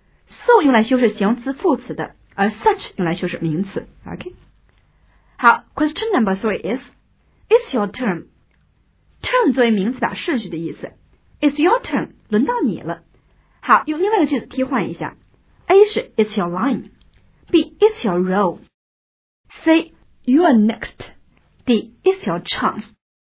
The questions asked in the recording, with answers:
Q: it's your turn.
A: 答应该是 C, you are next, 你是下一个